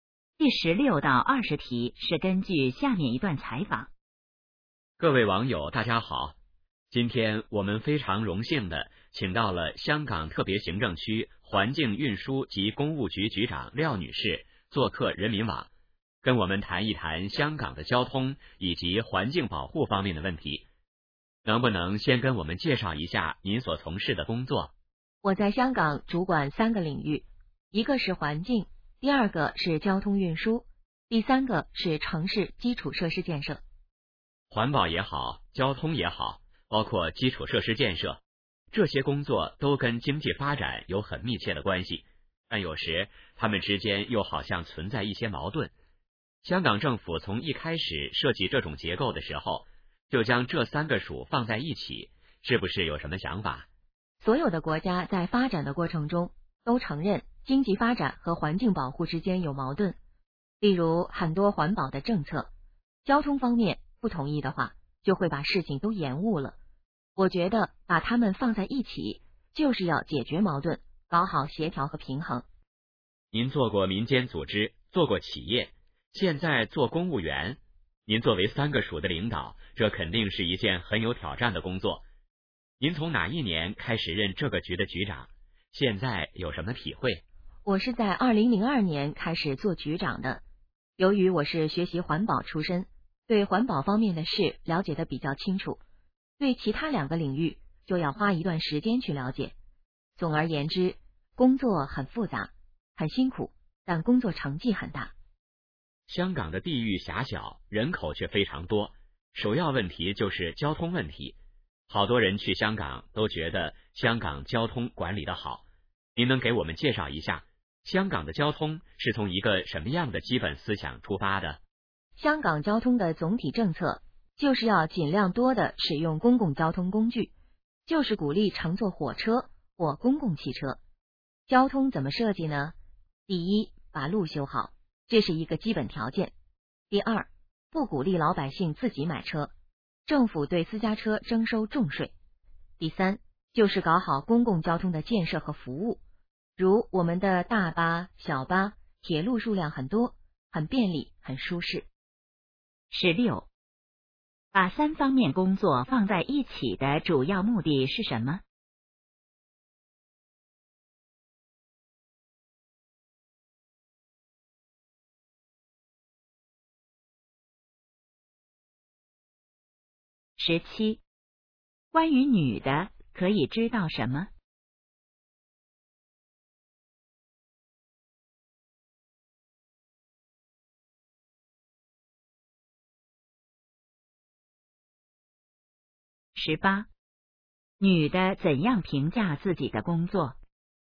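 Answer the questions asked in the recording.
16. 解决矛盾,搞好协调和平衡
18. 很复杂,很辛苦,但成绩很大
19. 管理得好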